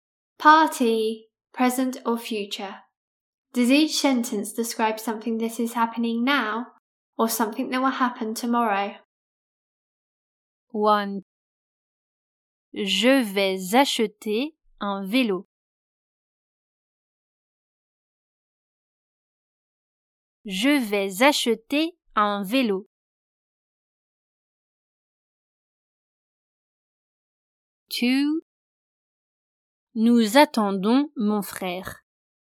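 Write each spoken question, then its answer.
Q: Je vais acheter un vélo.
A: will happen tomorrow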